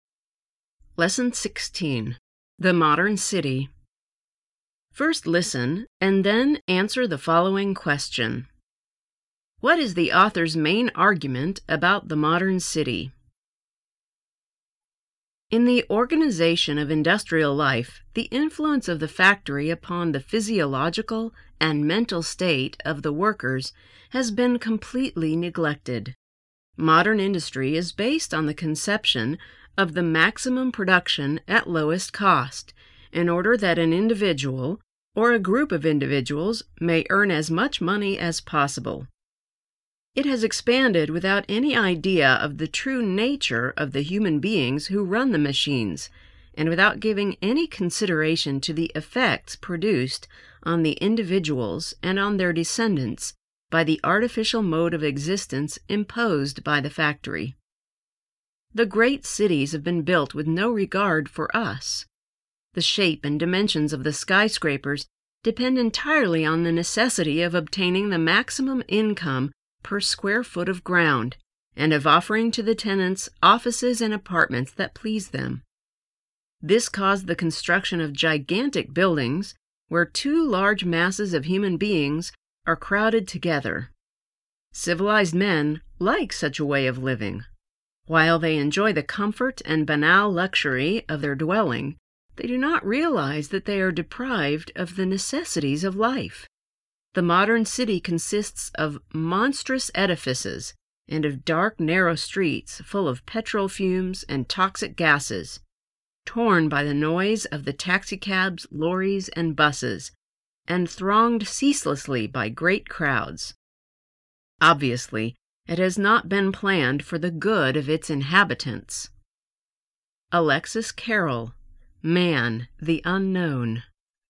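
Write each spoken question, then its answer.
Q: What is the author's main argument about the modern city?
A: The modern city was built for maximum profit with no regard for the health and well-being of its inhabitants.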